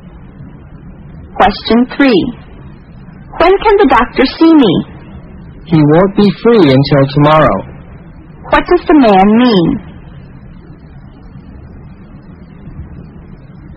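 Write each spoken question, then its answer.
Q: What does the man mean?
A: The doctor can see her tomorrow at the earliest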